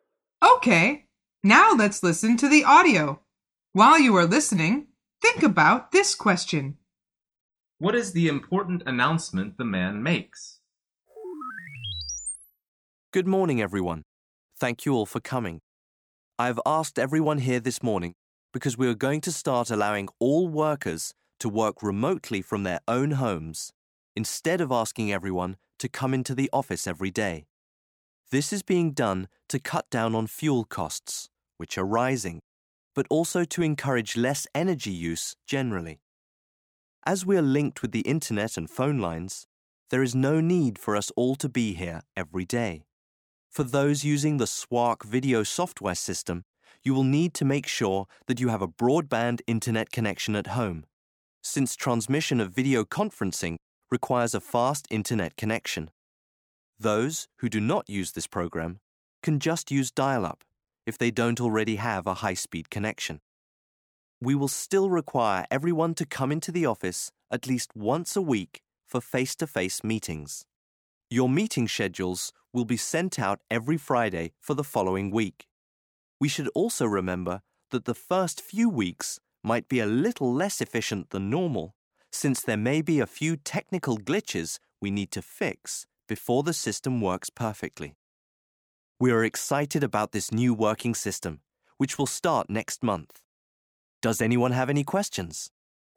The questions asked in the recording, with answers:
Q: What is the important announcement the man makes?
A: Employees will be able to work from home in the future.